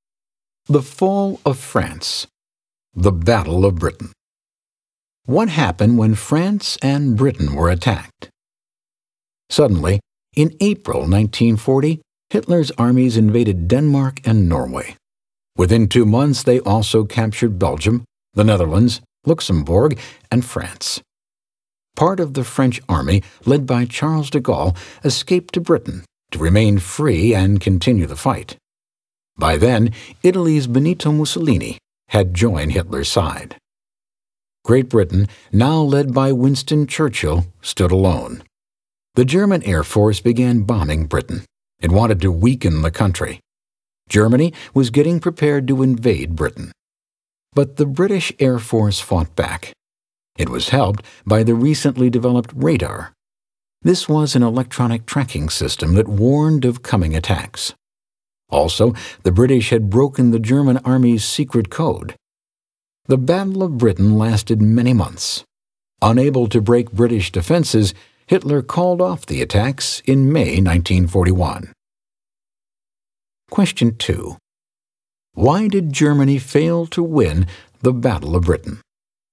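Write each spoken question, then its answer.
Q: Why did Germany fail to win the Battle of Britain?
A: The British Air Force fought back, helped by radar and by having broken the German secret code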